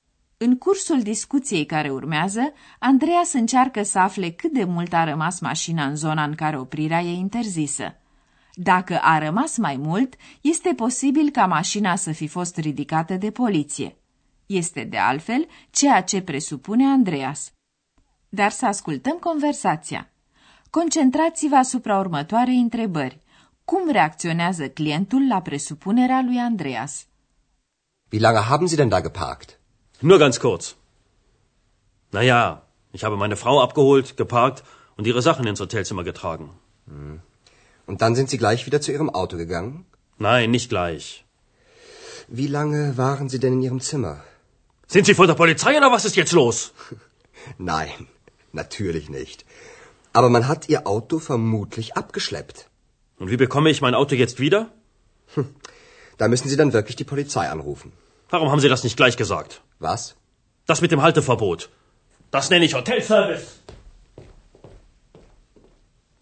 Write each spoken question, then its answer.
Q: Cum reacționează clientul la presupunerea lui Andreas?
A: Clientul își varsă pe Andreas năduful că i s-a ridicat mașina.